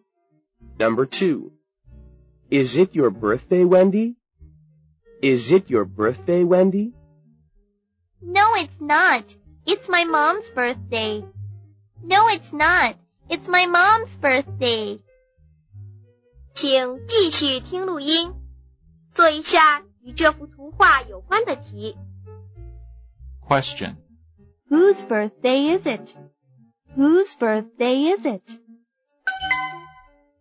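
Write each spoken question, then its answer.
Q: Whose birthday is it? Whose birthday is it?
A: Wendy's mom's birthday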